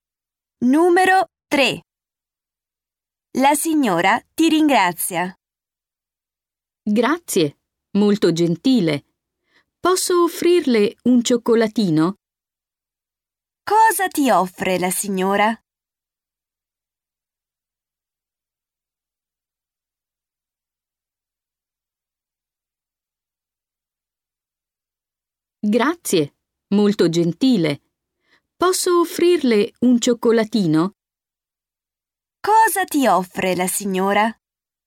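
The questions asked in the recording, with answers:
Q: Cosa ti offre la signora?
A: Un cioccolatino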